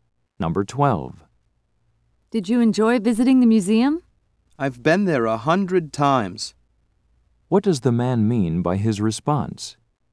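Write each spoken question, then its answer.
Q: What does the man mean by his response?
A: He has been there many times, so it was not special.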